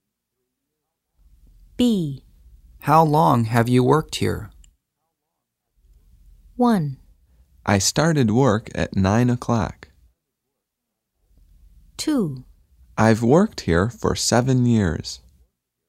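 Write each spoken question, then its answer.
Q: How long have you worked here?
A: 2: I've worked here for 7 years.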